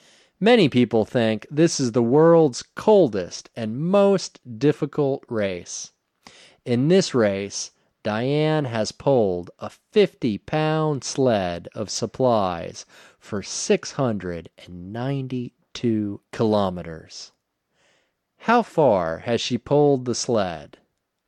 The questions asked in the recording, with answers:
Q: How far has she pulled the sled?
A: She has pulled the sled for 692 kilometers.